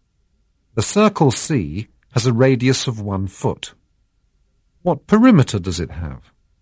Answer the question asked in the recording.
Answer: The circle C has a perimeter of 6.2832 feet.